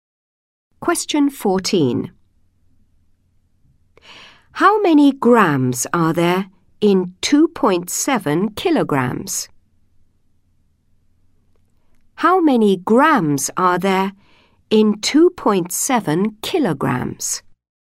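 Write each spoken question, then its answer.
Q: How many grams are there in 2.7 kilograms?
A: 2700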